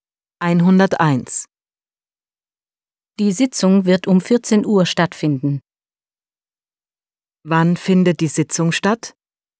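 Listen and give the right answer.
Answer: Um 14 Uhr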